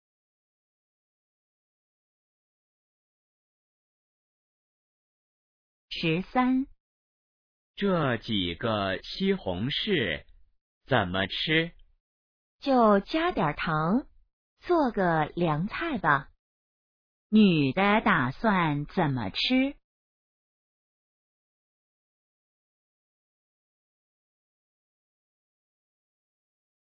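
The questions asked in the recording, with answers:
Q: 女的打算怎么吃?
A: 加点糖做凉菜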